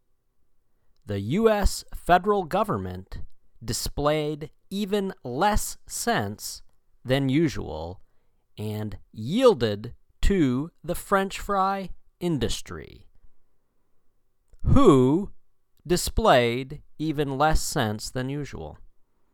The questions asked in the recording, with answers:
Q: Who displayed even less sense than usual?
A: The U.S. federal government.